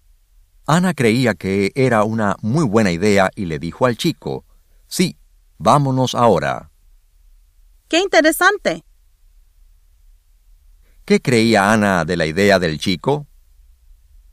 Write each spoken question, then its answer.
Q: ¿Qué creía Ana de la idea del chico?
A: Ana creía que era una muy buena idea.